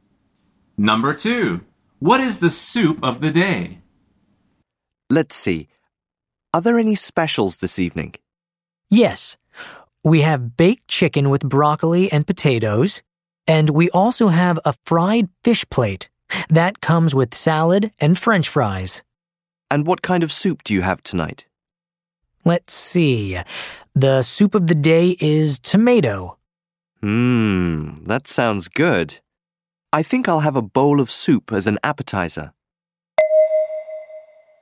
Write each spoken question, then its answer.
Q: What is the soup of the day?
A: The answer is tomato soup.